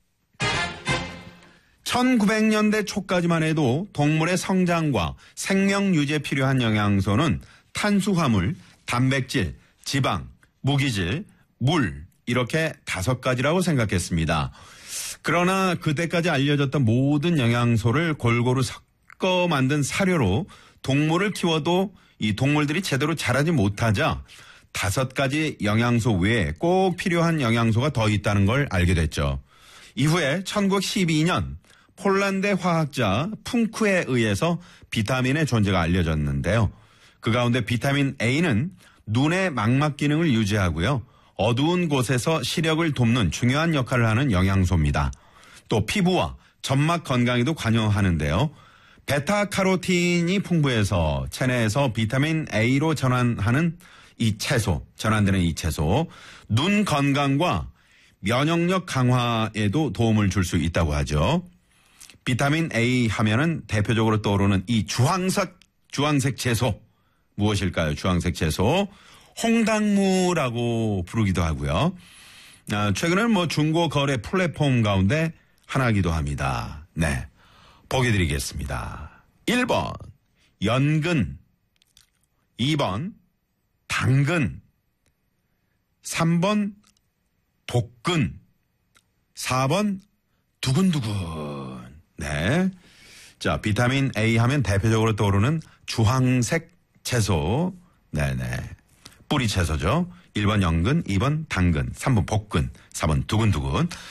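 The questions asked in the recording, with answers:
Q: 비타민 A 하면은 대표적으로 떠오르는 이 주황색 채소, 무엇일까요?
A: 2: 당근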